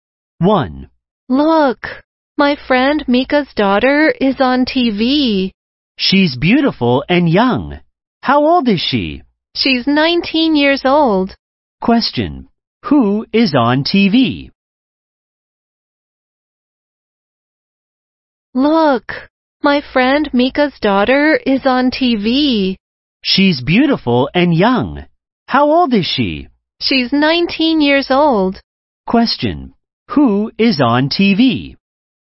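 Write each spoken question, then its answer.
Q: Who is on TV?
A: Mika's daughter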